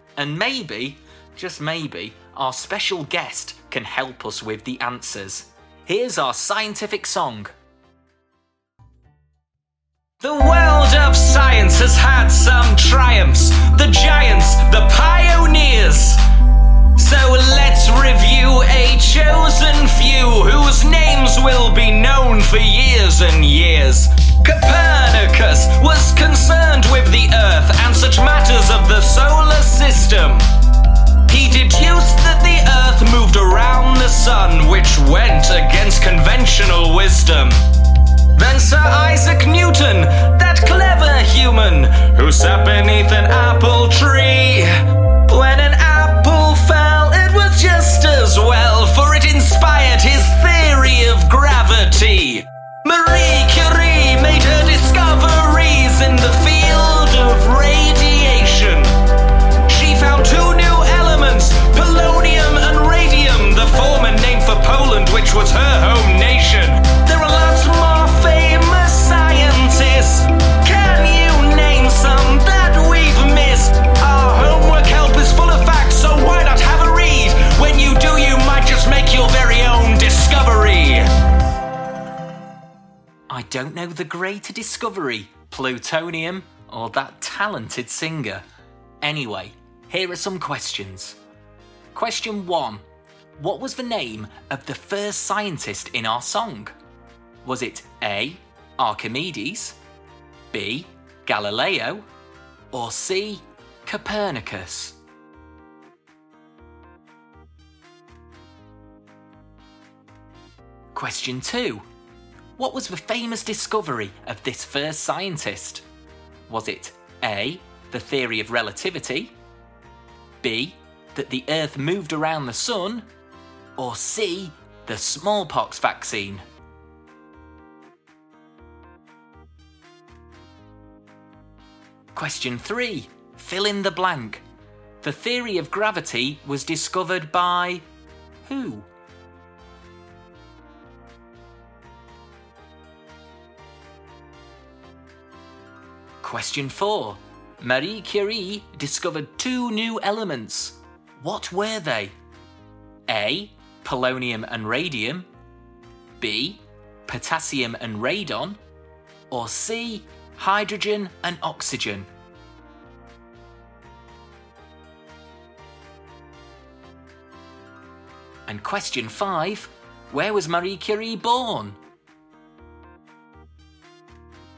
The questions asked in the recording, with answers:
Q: What was the name of the first scientist in our song?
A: So the answer is C, Copernicus.

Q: What was the famous discovery of this first scientist?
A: He certainly did. So that's B.

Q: The theory of gravity was discovered by who?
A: Tis I, Sir Isaac Newton.

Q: Marie Curie discovered two new elements. What were they?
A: Yes, the answer is A, polonium and radium.

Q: Where was Marie Curie born?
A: She was from Poland.